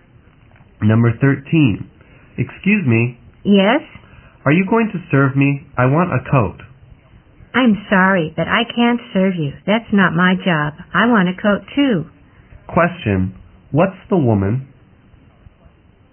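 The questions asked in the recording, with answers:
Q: What's the woman?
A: A customer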